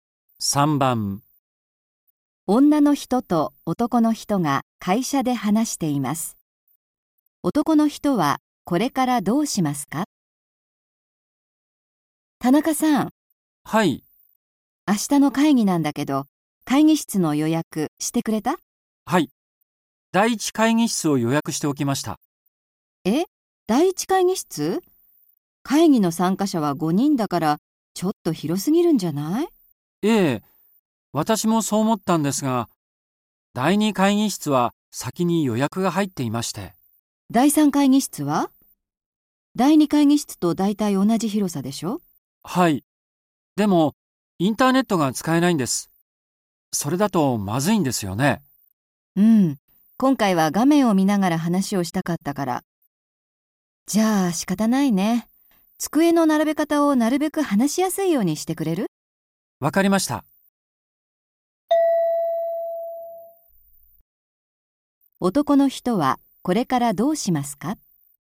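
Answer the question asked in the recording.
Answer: 第一会議室の机を話しやすいように並べる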